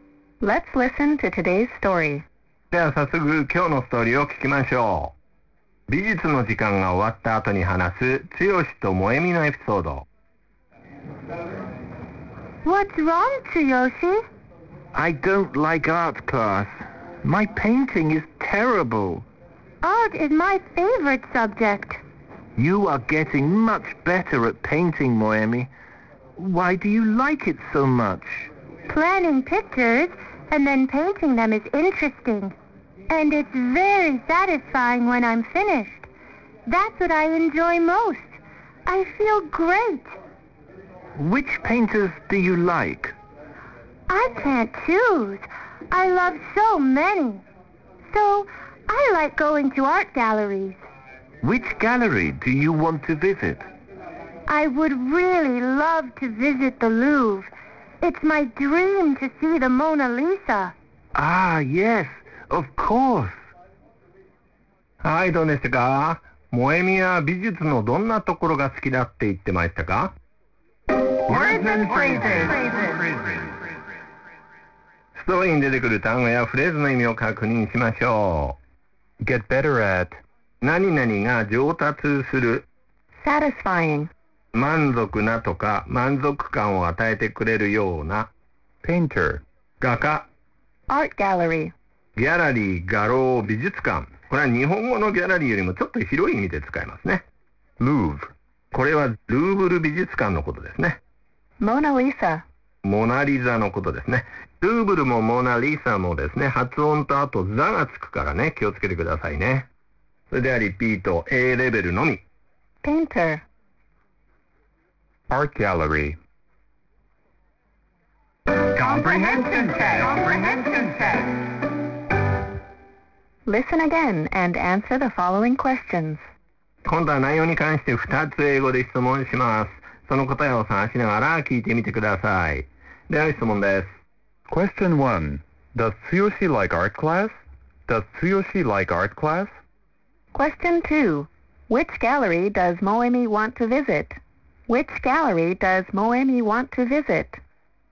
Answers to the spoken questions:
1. Answer. No, he doesn't.
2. Answer. The Louvre.